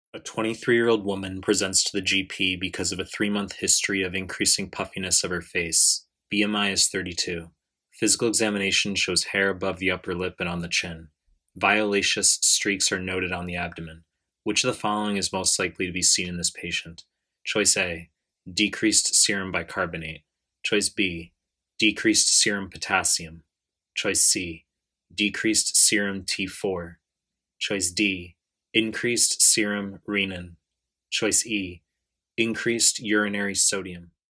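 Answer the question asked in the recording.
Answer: B: decreased serum potassium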